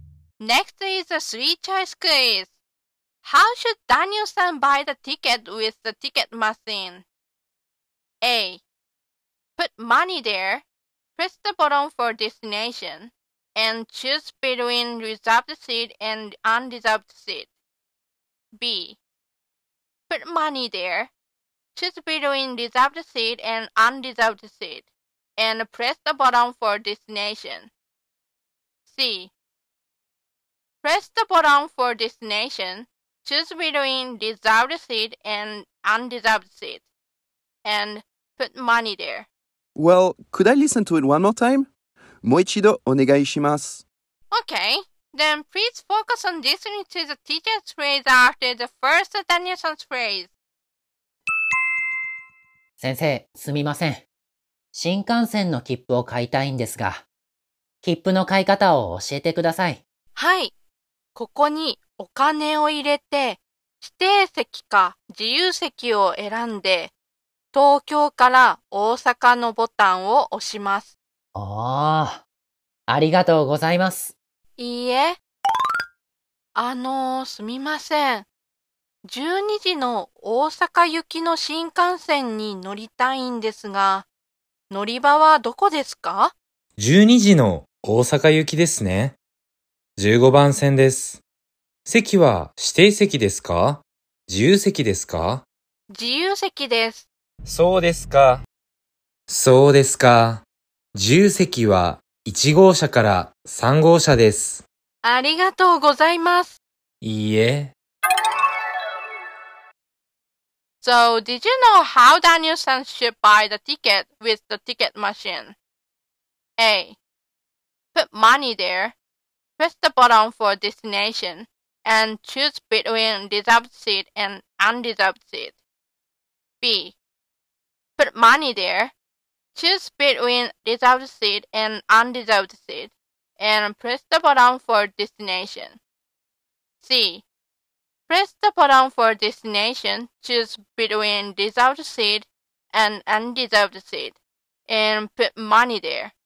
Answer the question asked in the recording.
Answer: So the answer is B.